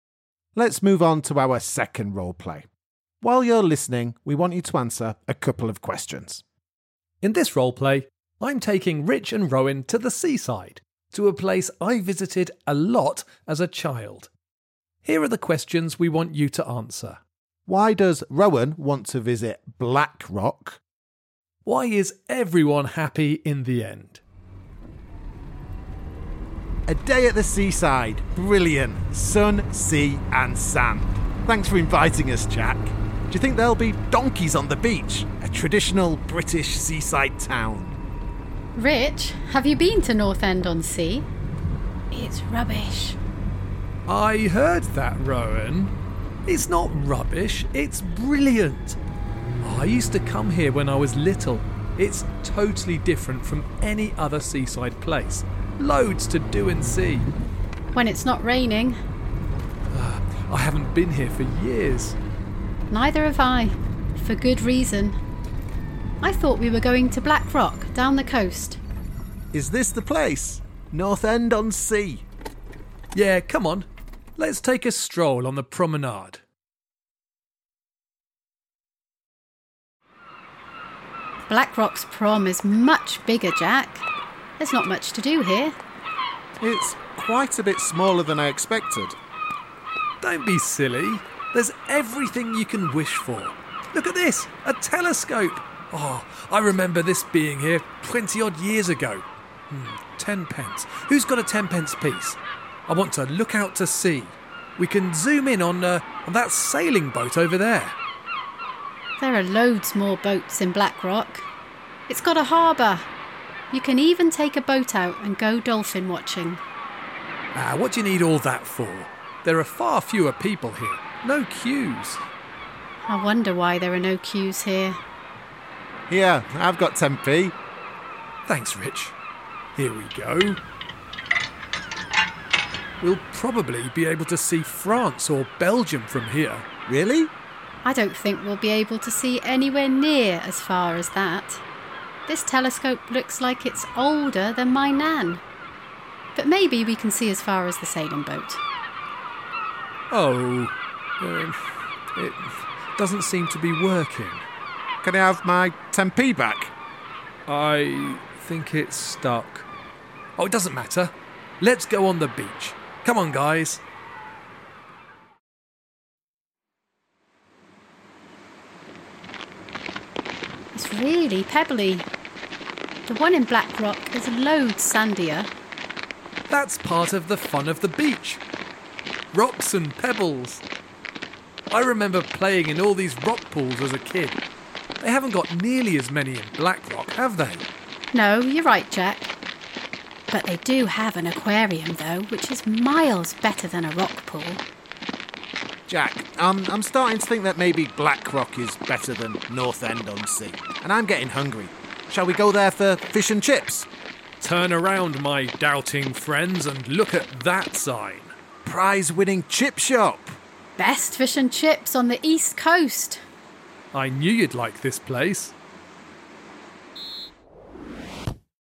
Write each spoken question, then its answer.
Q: Why does Rowan want to visit Black Rock?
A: Well, I wanted to go to Blackrock because there are more things to do and see.

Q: Why is everyone happy in the end?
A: Well, I was a little hungry and Jack pointed out the best fish and chip shop on the East Coast.